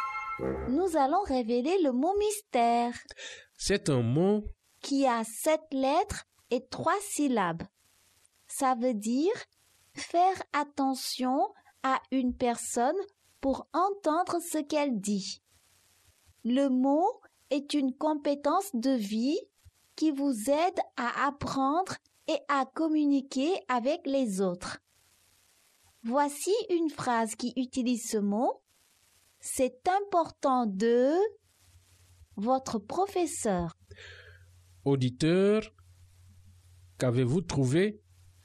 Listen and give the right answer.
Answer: Le mot mystère est écouter.